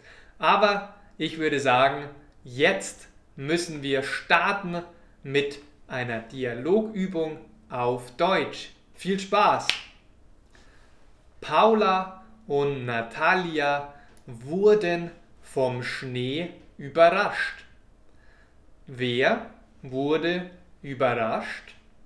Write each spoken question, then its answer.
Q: Wer wurde überrascht,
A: Paula und Natalia. Sie wurden vom Schnee überrascht.